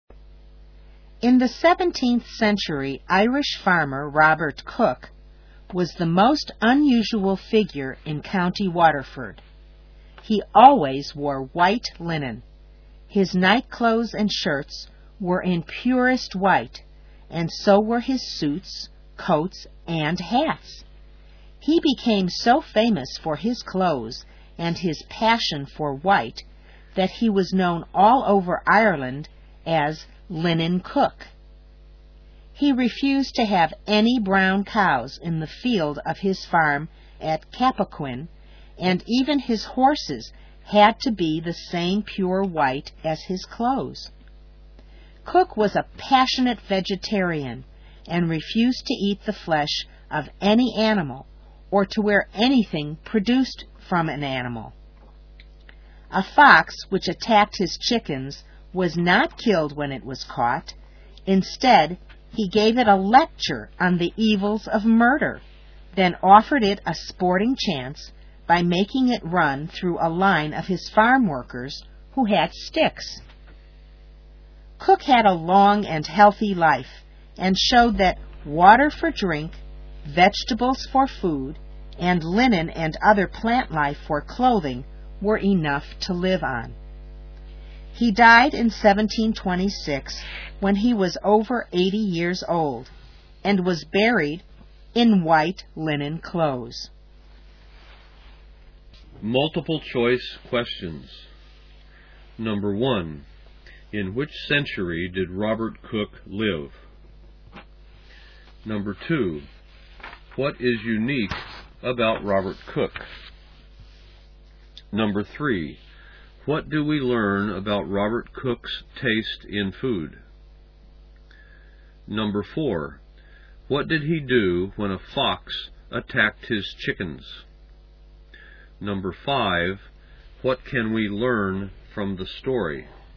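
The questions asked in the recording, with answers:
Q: in which century did Robert Cook live?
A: the 17th century

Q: what is unique about Robert Cook?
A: He always wore white linen and liked everything white

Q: what do we learn about Robert Cook's taste in food?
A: He was a vegetarian who ate no meat

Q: what did he do when a fox attacked his chickens?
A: He gave it a lecture on the evils of murder, then made it run through a line of his farm workers who had sticks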